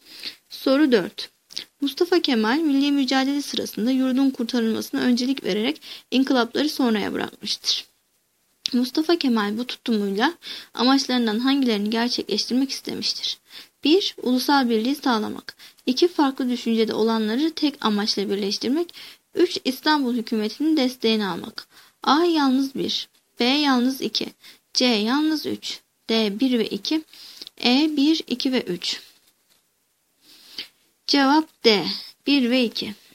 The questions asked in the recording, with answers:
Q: Mustafa Kemal bu tutumuyla amaçlarından hangilerini gerçekleştirmek istemiştir?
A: Cevap D. 1 ve 2.